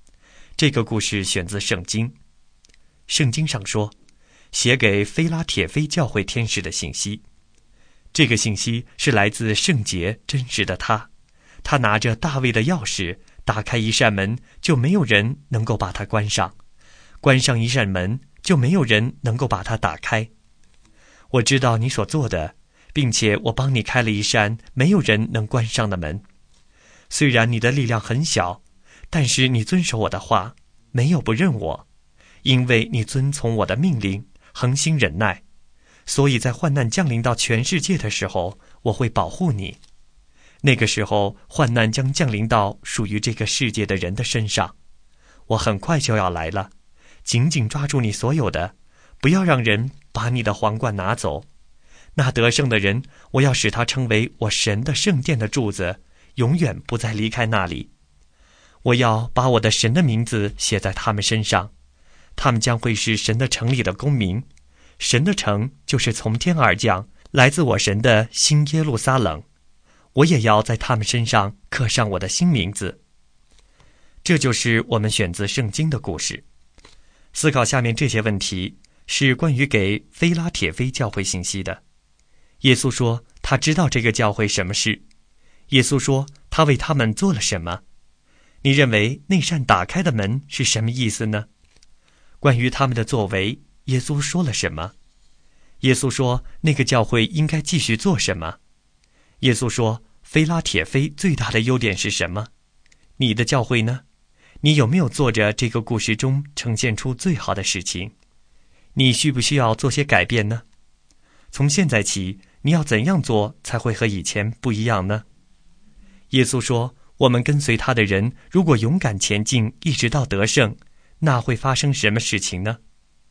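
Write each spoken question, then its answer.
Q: 耶稣说,他为他们做了什么。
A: 为他们开了一扇没有人能关上的门

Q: 关于他们的作为,耶稣说了什么?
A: 他们力量虽小,却遵守他的话,没有不认他,恒心忍耐

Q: 耶稣说,那个教会应该继续做什么?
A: 紧紧抓住所有的,不要让人把皇冠拿走

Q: 耶稣说,我们跟随他的人如果勇敢前进,一直到得胜,那会发生什么事情呢?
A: 成为神殿里的柱子,永不离开,身上写上神的名字,成为新耶路撒冷的公民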